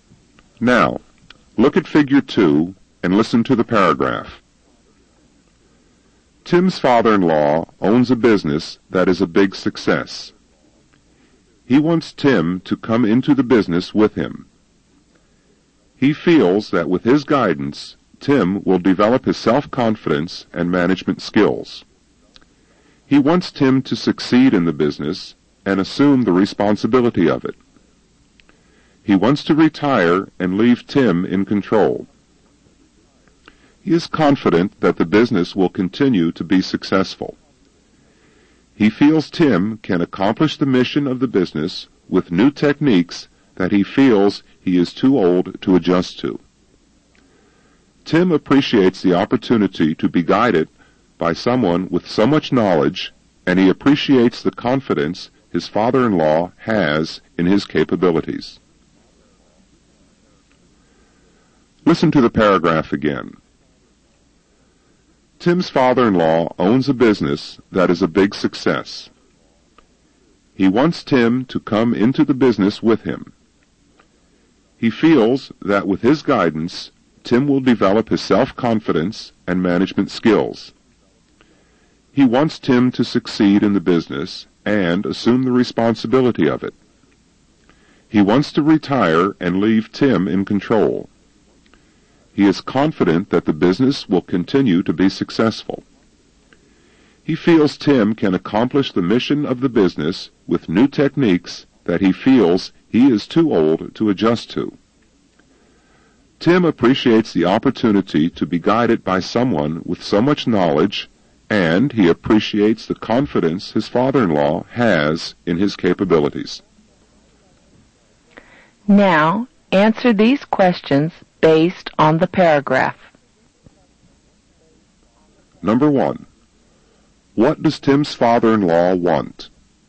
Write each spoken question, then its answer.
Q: What does Tim's father-in-law want?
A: He wants Tim to come into the business with him.